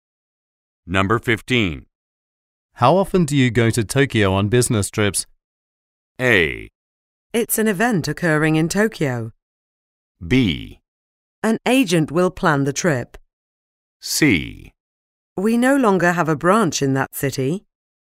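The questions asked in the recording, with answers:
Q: How often do you go to Tokyo on business trips?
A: C: We no longer have a branch in that city.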